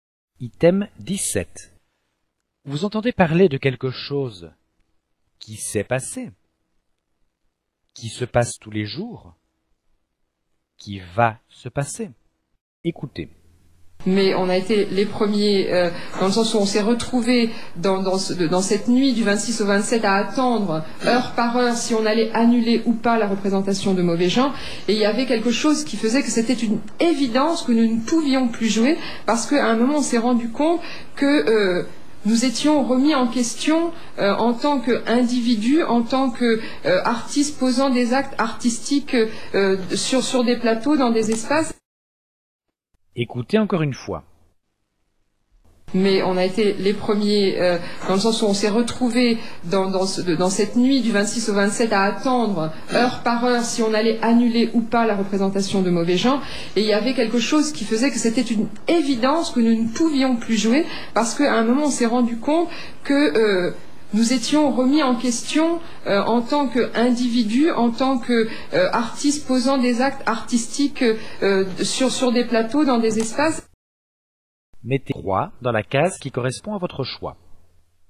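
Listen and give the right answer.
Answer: qui s'est passé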